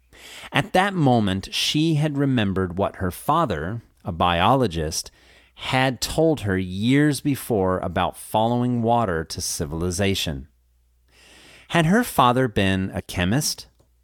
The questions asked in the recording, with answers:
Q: Had her father been a chemist?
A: No, her father had been a biologist.